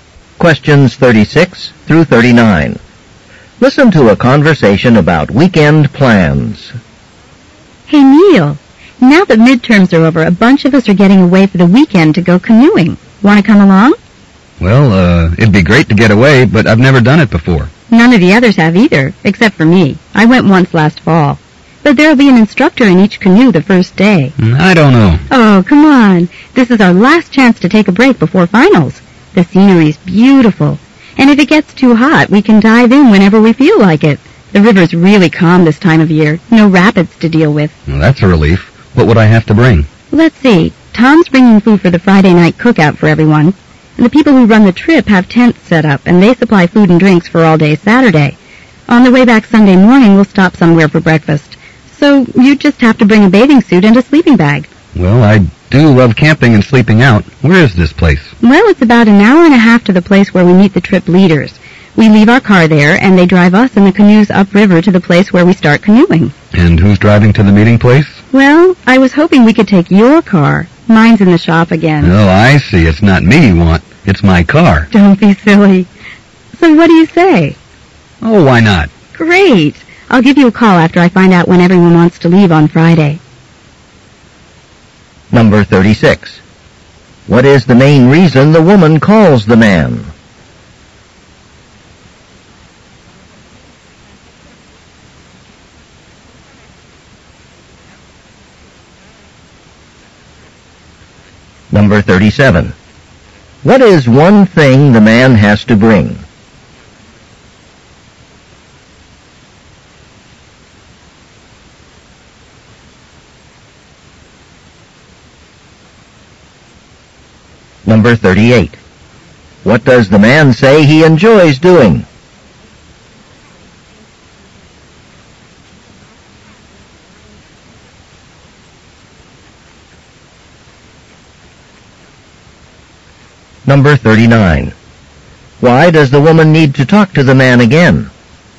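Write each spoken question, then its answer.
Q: What is the main reason the woman calls the man?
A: To invite him on a weekend canoe trip.

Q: What is one thing the man has to bring?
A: A bathing suit or a sleeping bag.

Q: What does the man say he enjoys doing?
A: Camping and sleeping outdoors.

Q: Why does the woman need to talk to the man again?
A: To tell him what time they'll leave on Friday.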